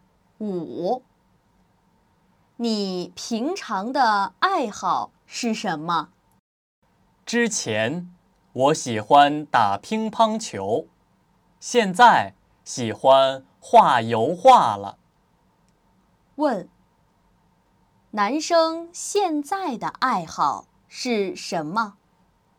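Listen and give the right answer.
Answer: 画油画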